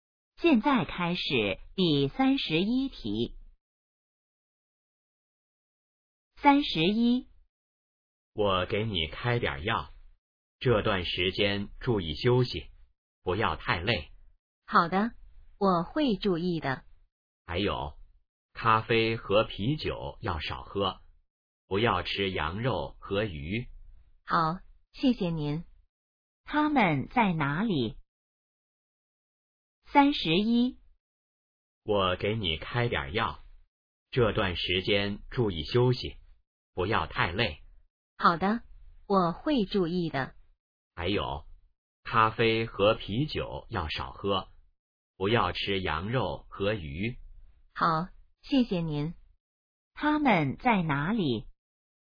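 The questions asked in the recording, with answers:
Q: 他们在哪里?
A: 医院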